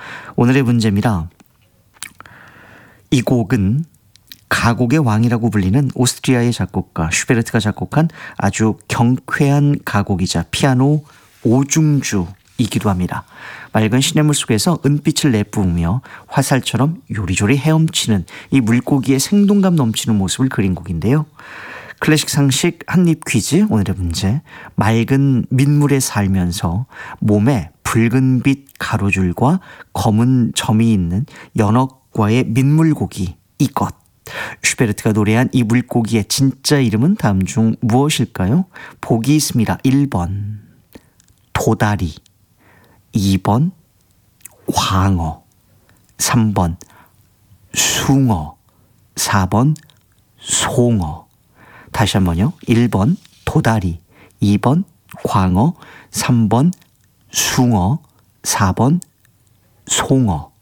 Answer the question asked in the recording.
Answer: 슈베르트의 송어